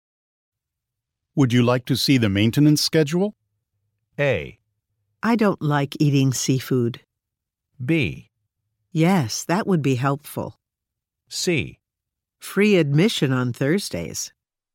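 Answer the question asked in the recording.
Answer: B: Yes, that would be helpful.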